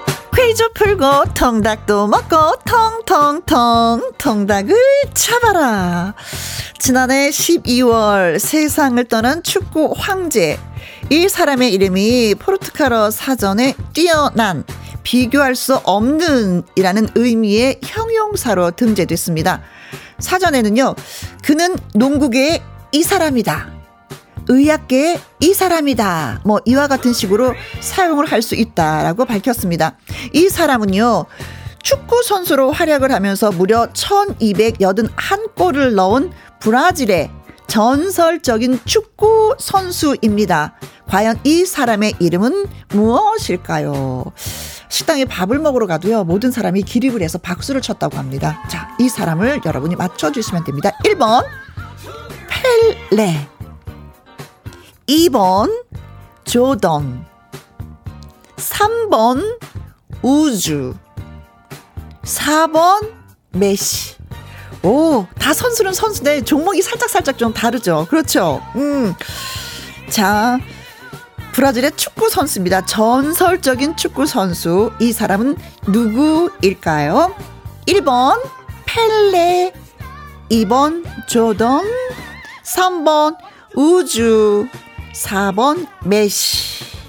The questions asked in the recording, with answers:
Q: 전설적인 축구 선수. 이 사람은 누구일까요? 1번 펠레, 2번 조던, 3번 우주, 4번 메시.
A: 펠레!